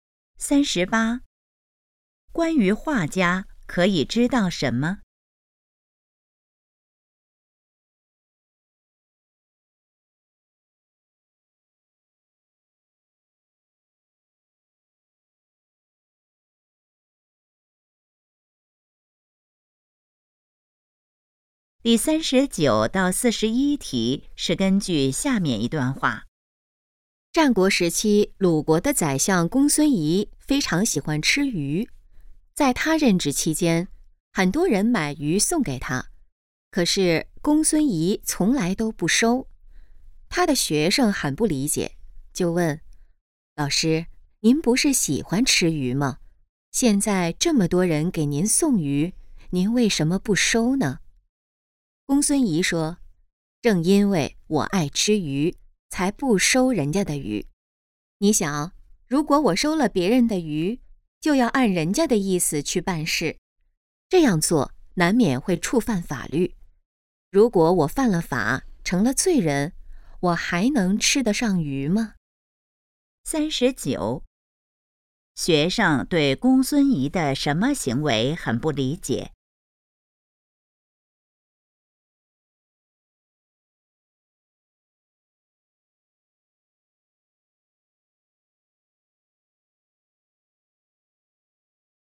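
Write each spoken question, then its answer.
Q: 学生对公孙仪的什么行为很不理解?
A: 喜欢吃鱼却不收别人送的鱼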